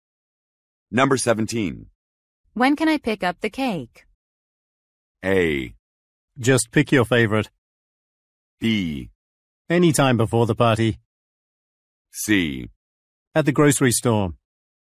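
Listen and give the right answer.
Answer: B: Anytime before the party.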